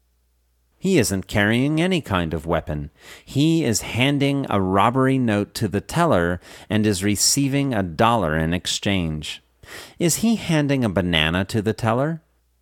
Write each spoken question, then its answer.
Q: Is he handing a banana to the teller?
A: No, he isn't handing a banana to the teller.